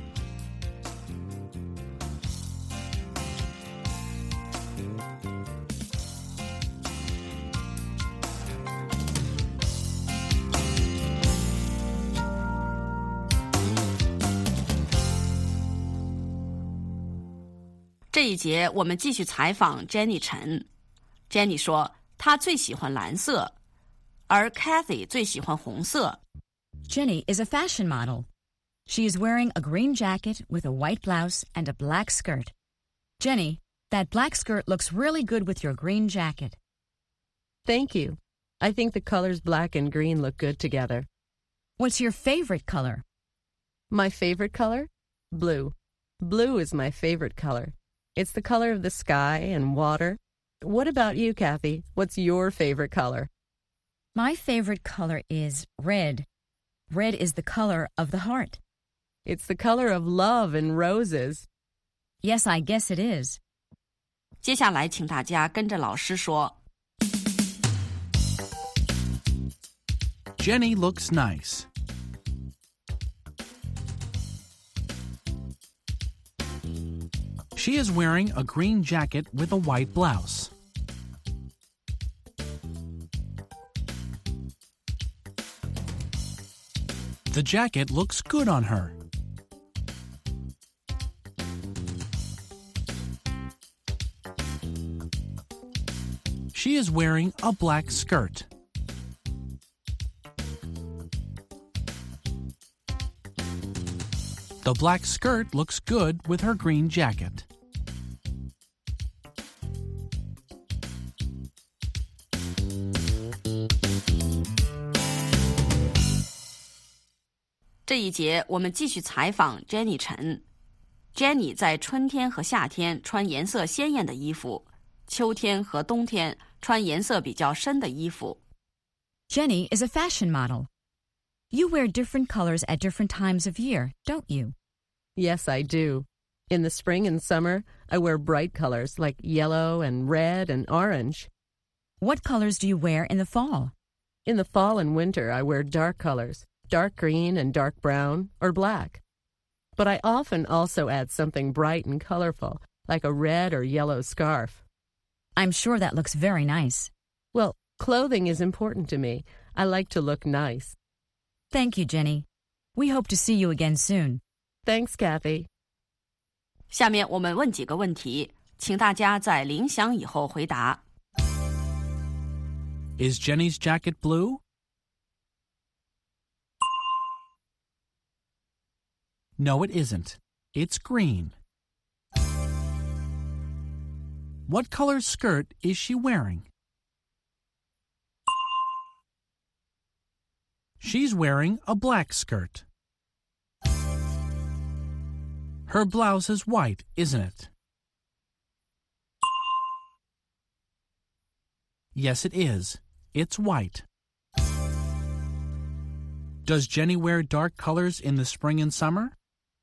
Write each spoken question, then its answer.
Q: Is Jenny's jacket blue?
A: No, it isn't. It's green.

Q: What color skirt is she wearing?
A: She's wearing a black skirt.

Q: Does Jenny wear dark colors in the spring and summer?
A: No, she doesn't. In the spring and summer, she wears bright colors.